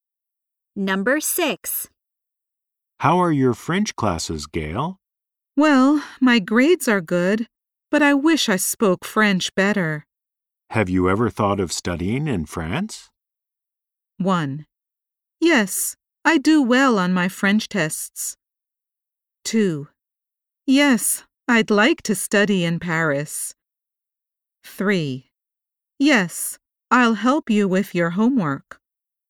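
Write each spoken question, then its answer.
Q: Have you ever thought of studying in France?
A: 2: Yes, I'd like to study in Paris.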